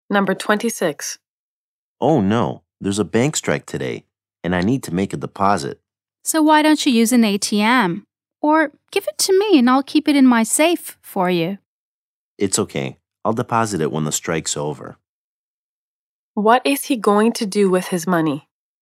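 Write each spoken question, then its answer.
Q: What is he going to do with his money?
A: Deposit it in the bank when the strike is over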